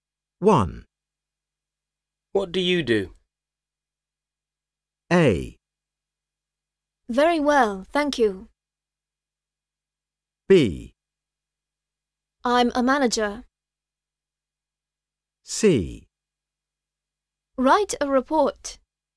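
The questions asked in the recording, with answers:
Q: What do you do?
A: B: I'm a manager.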